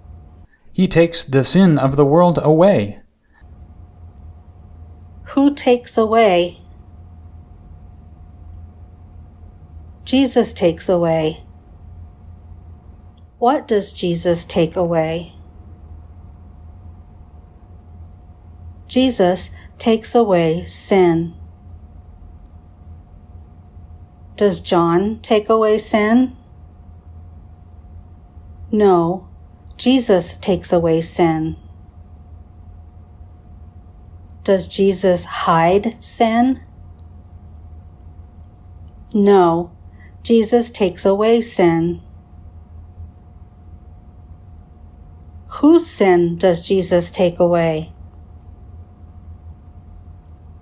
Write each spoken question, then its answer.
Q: Whose sin does Jesus take away?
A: Jesus takes away the sin of the world.